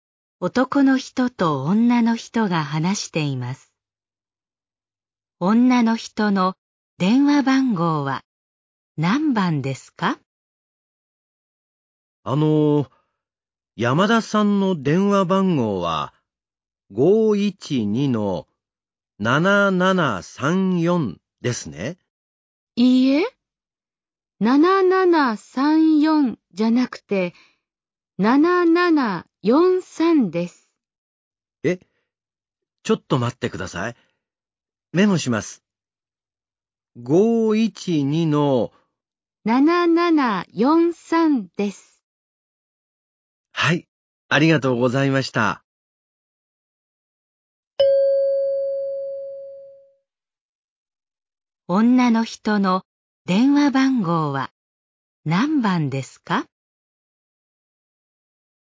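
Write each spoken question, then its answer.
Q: 女の人の電話番号は何番ですか?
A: 512-7743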